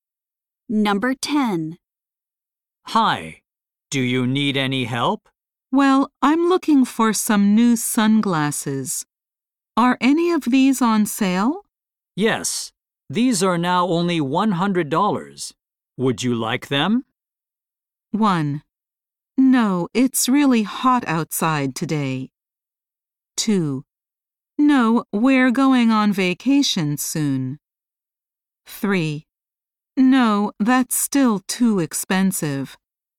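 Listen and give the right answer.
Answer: 3: No, that's still too expensive.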